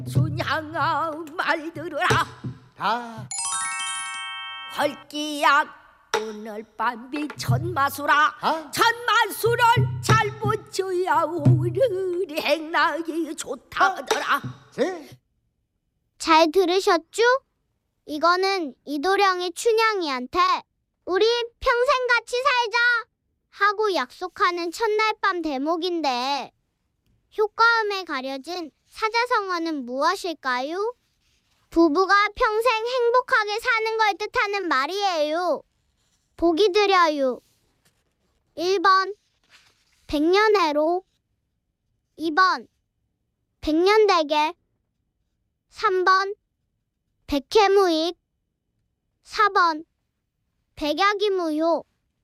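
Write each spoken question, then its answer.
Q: 이거는 이도령이 춘향이한테 우리 평생 같이 살자 하고 약속하는 첫날 밤 대목인데 효과음에 가려진 사자성어는 무엇일까요?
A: 1번: 백년해로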